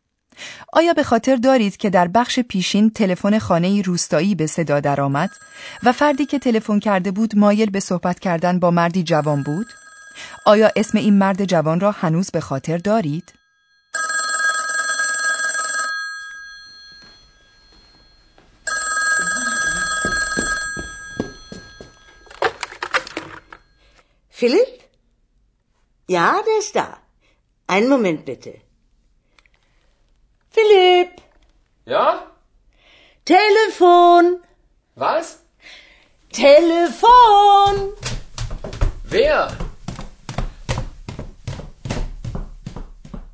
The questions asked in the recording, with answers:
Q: آیا اسم این مرد جوان را هنوز به خاطر دارید؟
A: پس متوجه شدیم که اسم این مرد جوان فیلیپ است.